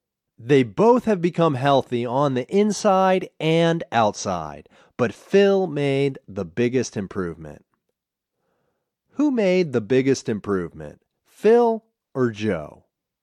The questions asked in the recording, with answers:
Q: Who made the biggest improvement, Phil or Joe?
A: Phil made the biggest improvement.